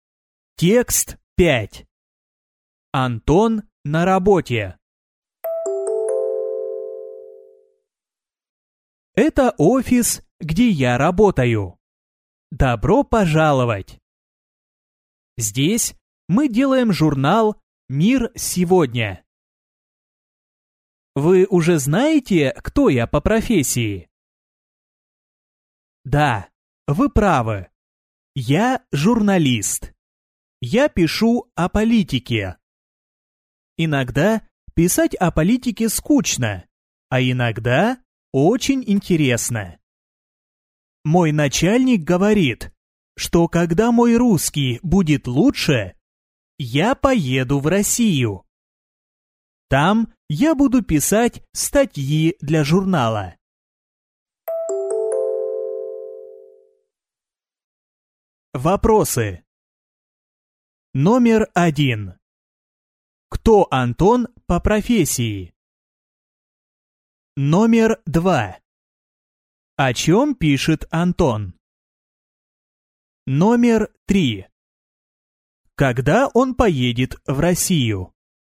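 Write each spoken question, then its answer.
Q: Кто Антон по профессии?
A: Журналист

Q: О чем пишет Антон?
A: О политике

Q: Когда он поедет в Россию?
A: Когда его русский будет лучше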